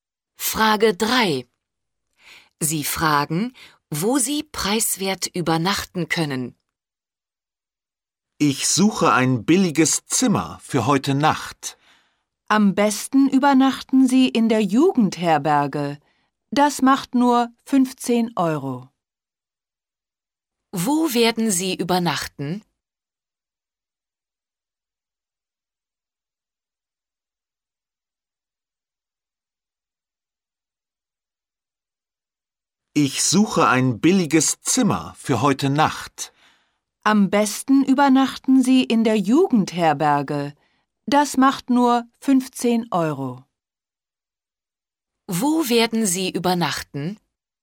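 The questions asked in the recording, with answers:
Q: Wo werden Sie übernachten?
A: In der Jugendherberge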